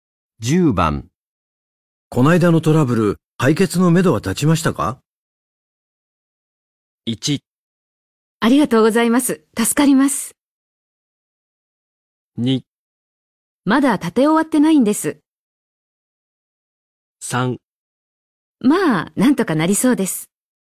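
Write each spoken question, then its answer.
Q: こないだのトラブル、解決のめどは立ちましたか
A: 3: まあ、なんとかなりそうです。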